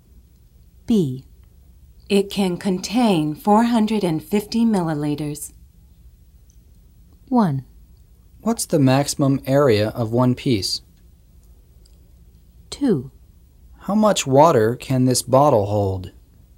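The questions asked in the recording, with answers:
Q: It can contain 450 milliliters.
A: 2: How much water can this bottle hold?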